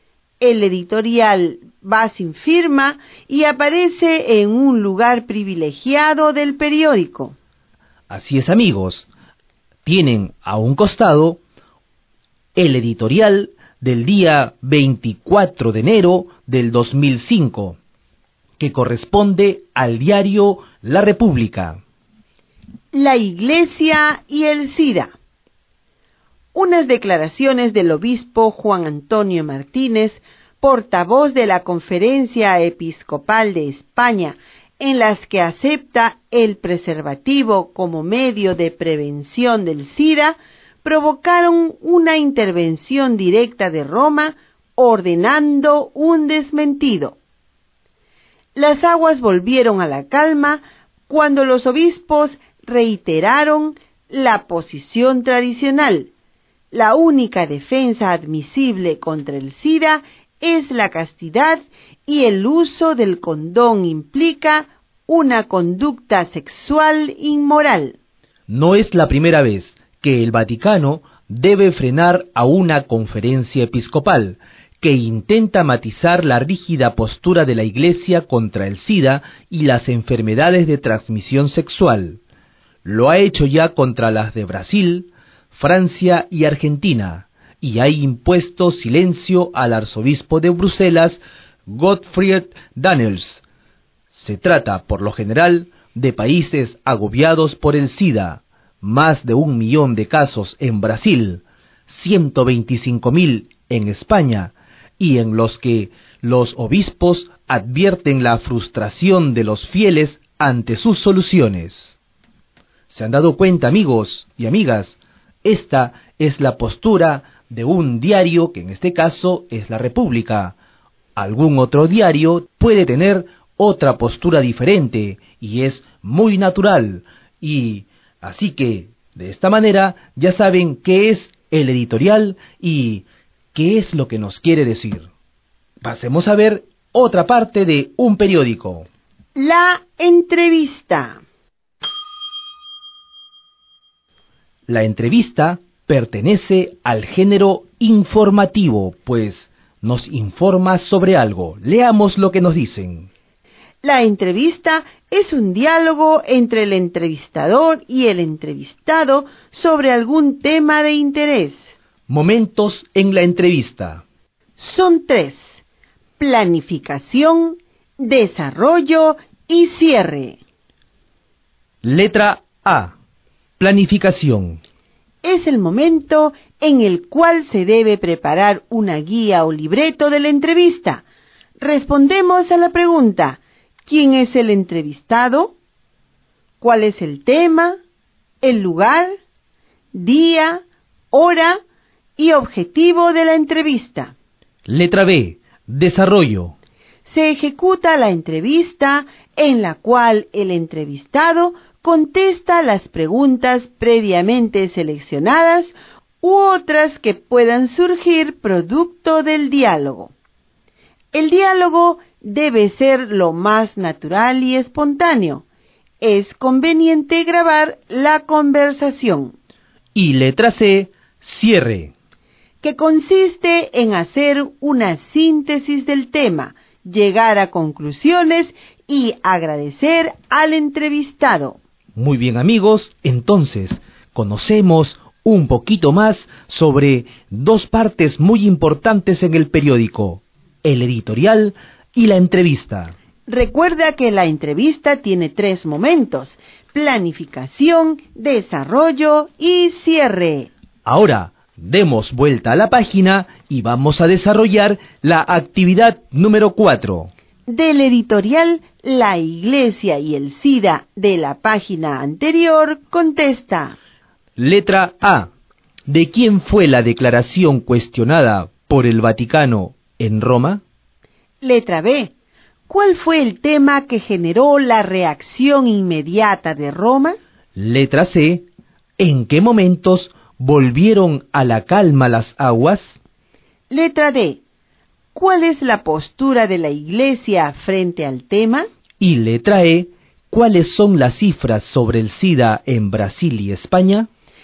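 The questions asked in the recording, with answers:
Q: ¿De quién fue la declaración cuestionada por el Vaticano en Roma?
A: Del obispo Juan Antonio Martínez, portavoz de la Conferencia Episcopal de España

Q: ¿Cuál fue el tema que generó la reacción inmediata de Roma?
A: Aceptar el preservativo como medio de prevención del SIDA

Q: ¿En qué momentos volvieron a la calma las aguas?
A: Cuando los obispos reiteraron la posición tradicional

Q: ¿Cuál es la postura de la Iglesia frente al tema?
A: La única defensa admisible contra el SIDA es la castidad; el uso del condón implica una conducta sexual inmoral

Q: ¿Cuáles son las cifras sobre el SIDA en Brasil y España?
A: Más de 1 millón de casos en Brasil y 125.000 en España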